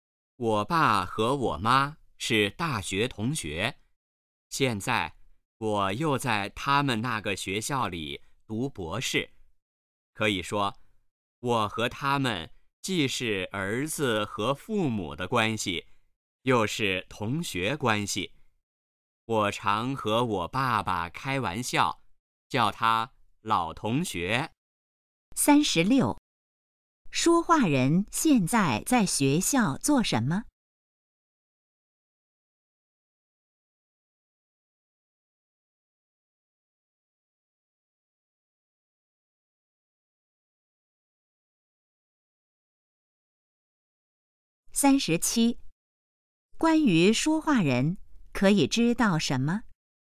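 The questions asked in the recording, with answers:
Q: 说话人现在在学校做什么?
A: 读博士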